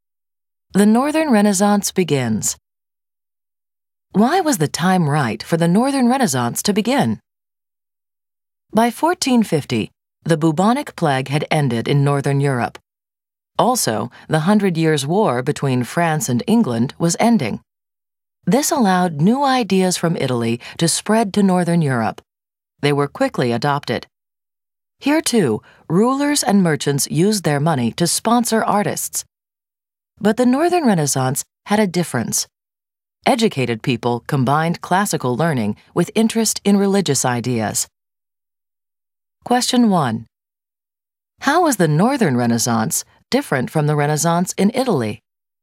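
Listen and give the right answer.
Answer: Educated people combined classical learning with interest in religious ideas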